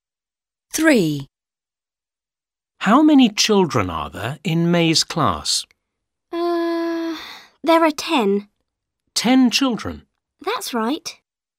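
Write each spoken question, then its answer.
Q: How many children are there in May's class?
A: 10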